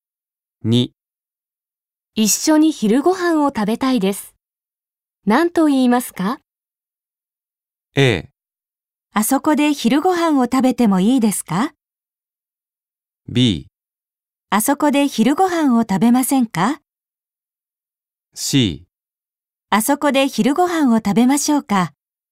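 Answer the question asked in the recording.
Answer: B: あそこで昼ご飯を食べませんか?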